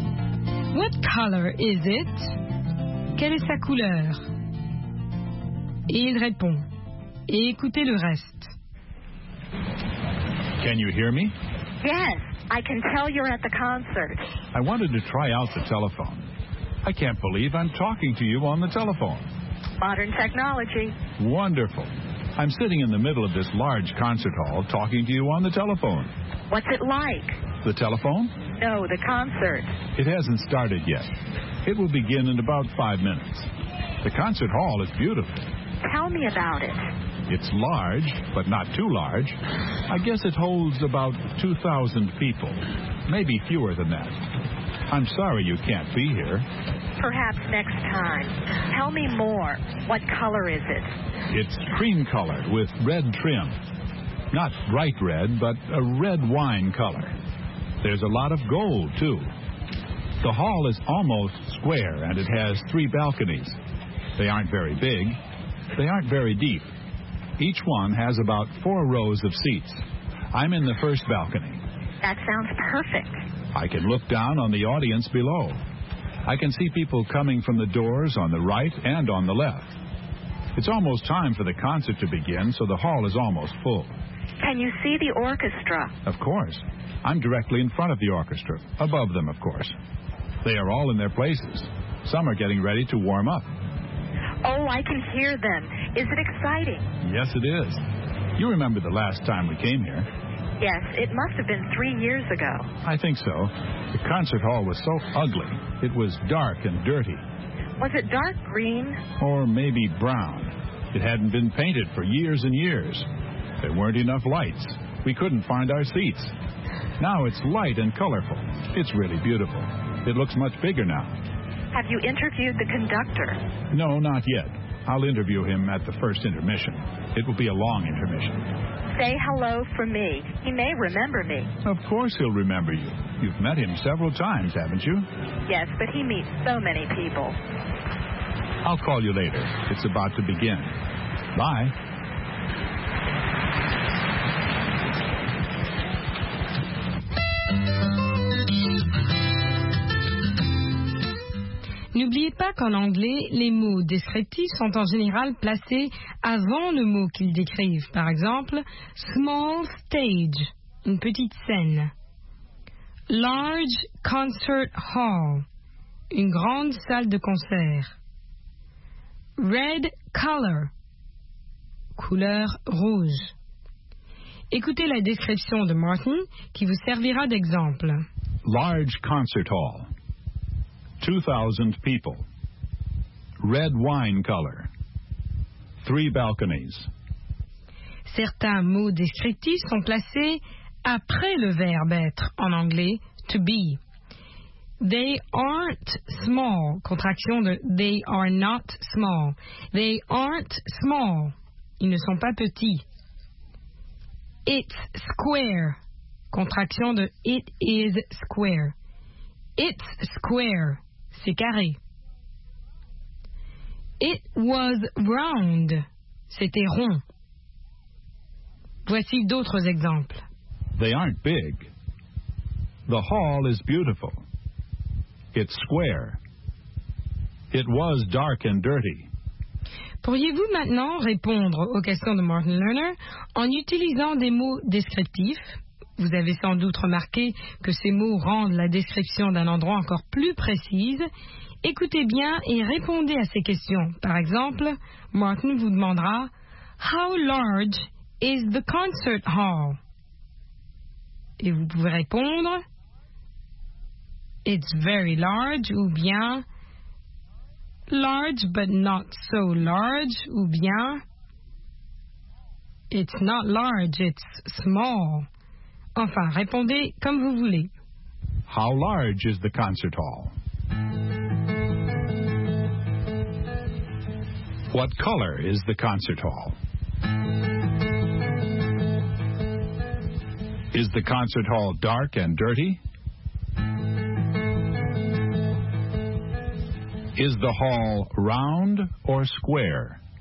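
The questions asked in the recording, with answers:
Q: How large is the concert hall?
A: It's large, but not too large (about 2,000 people).

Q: What color is the concert hall?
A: Cream colored with red trim.

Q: Is the concert hall dark and dirty?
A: No, it's light and colorful now.

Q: Is the hall round or square?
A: It's almost square.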